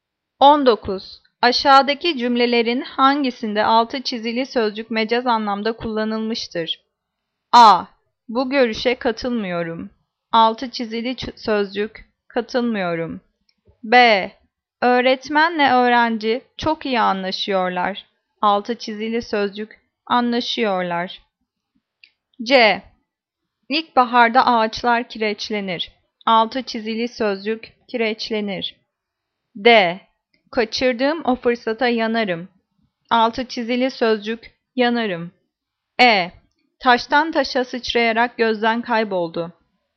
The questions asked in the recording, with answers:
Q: Aşağıdaki cümlelerin hangisinde altı çizili sözcük mecaz anlamda kullanılmıştır?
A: Cevap D. Kaçırdığım o fırsata yanarım.